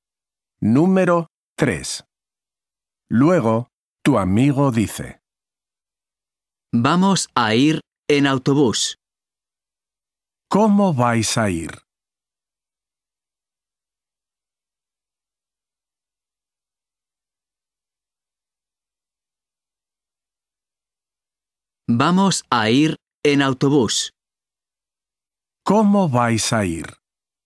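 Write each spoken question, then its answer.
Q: ¿Cómo vais a ir?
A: En autobús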